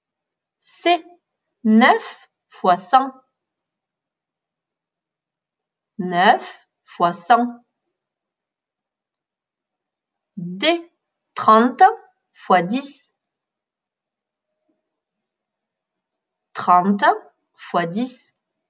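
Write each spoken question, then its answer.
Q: 9 fois 100.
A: 900

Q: 30 fois 10.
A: 300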